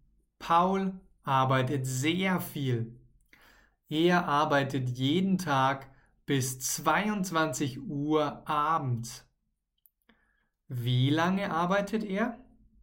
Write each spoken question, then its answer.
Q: Wie lange arbeitet er?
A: Bis 22 Uhr. Er arbeitet bis 22 Uhr abends.